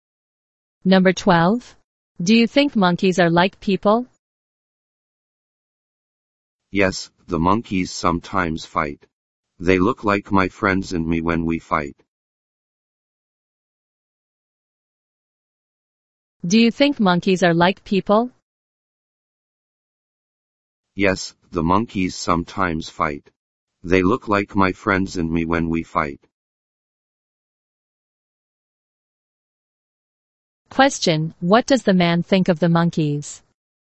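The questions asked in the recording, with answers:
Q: what does the man think of the monkeys?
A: They are like people; they look like him and his friends when they fight.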